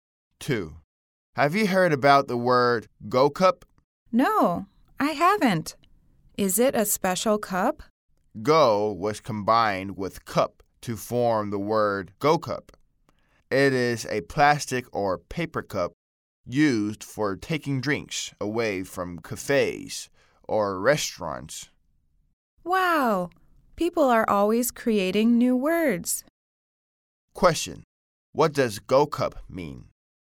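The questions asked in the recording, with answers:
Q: What does go cup mean?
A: A plastic or paper cup used for taking drinks away from cafes or restaurants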